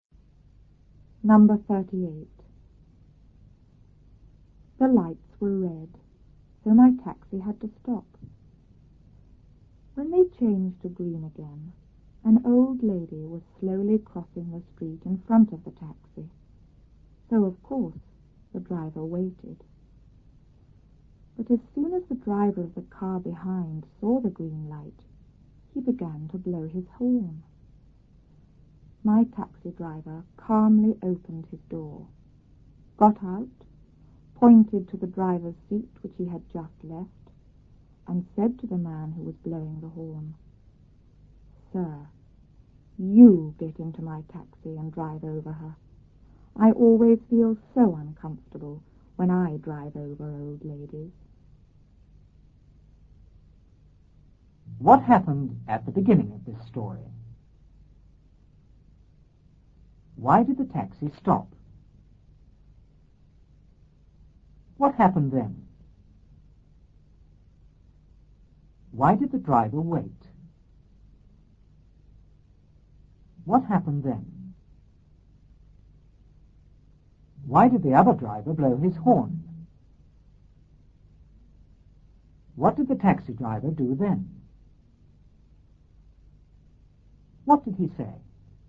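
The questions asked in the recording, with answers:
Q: Why did the taxi stop?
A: Because the lights were red

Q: Why did the driver wait?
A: An old lady was slowly crossing the street in front of the taxi

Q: Why did the other driver blow his horn?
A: Because he saw the green light

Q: What did he say?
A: "Sir, you get into my taxi and drive over her. I always feel so uncomfortable when I drive over old ladies."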